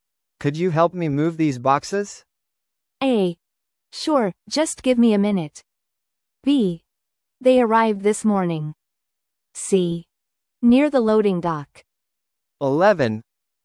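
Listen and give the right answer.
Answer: A: Sure, just give me a minute.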